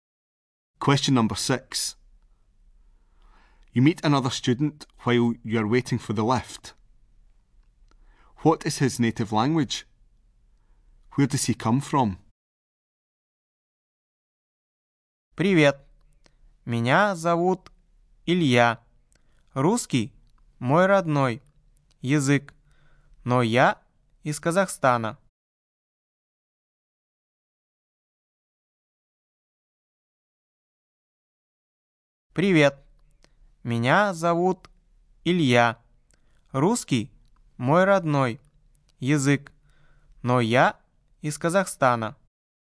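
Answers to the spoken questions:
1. Russian
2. Kazakhstan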